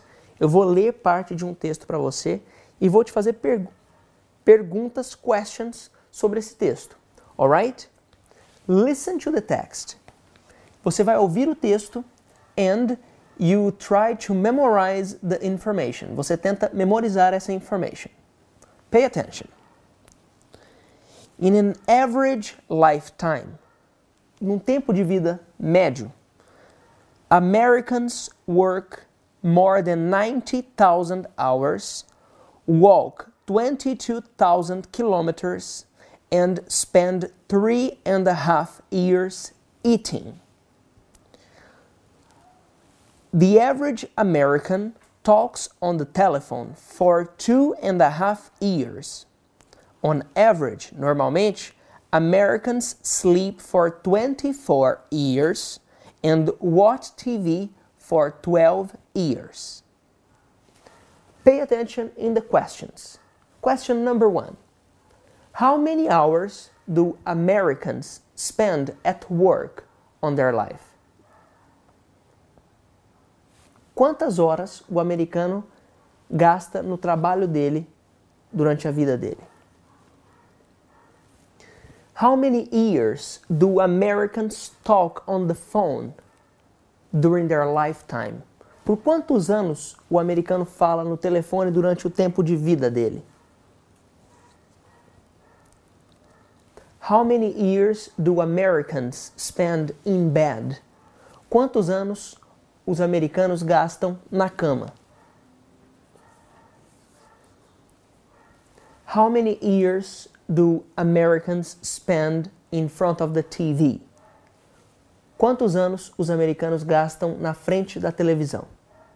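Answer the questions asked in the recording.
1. More than 90,000 hours
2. Two and a half years
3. 24 years
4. 12 years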